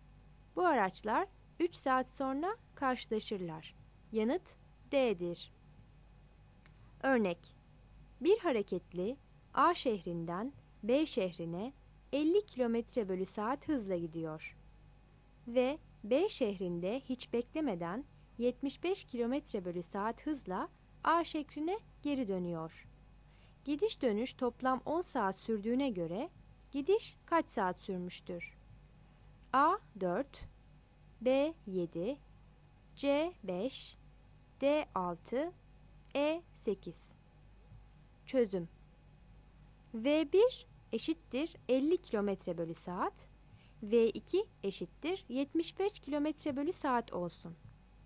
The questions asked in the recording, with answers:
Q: Gidiş dönüş toplam 10 saat sürdüğüne göre gidiş kaç saat sürmüştür?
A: Yanıt D'dir.